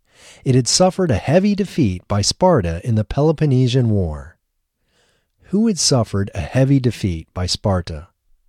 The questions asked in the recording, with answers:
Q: Who had suffered a heavy defeat by Sparta?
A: Athens had suffered a heavy defeat by Sparta.